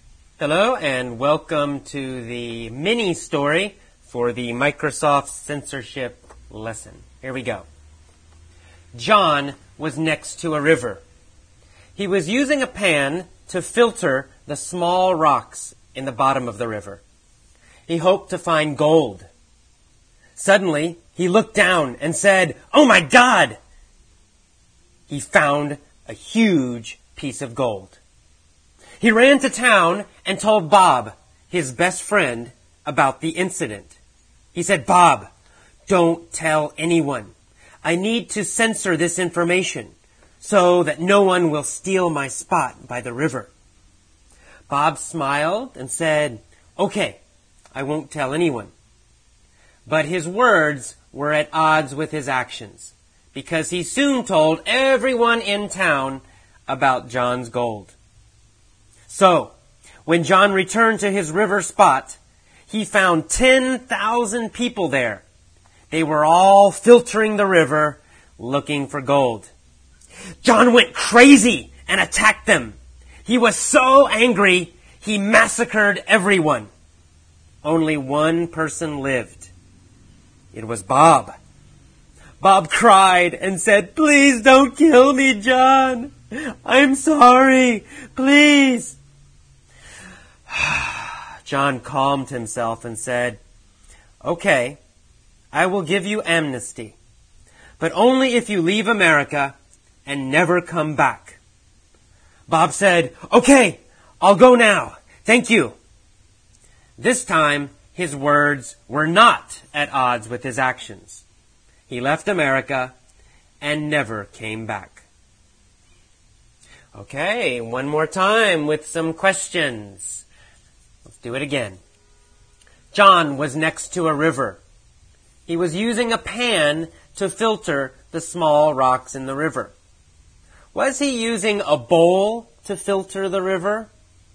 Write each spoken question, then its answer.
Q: Was he using a bowl to filter the river?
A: No, he wasn't using a bowl.